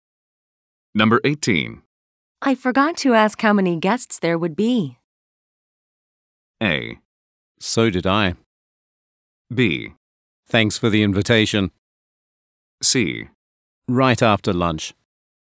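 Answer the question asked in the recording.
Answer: A: So did I.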